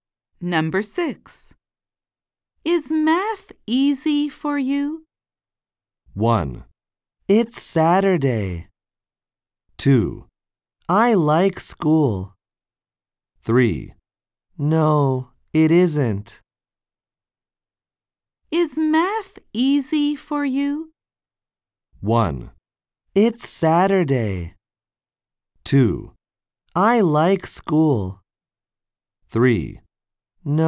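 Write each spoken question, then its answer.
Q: Is math easy for you?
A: 3: No, it isn't.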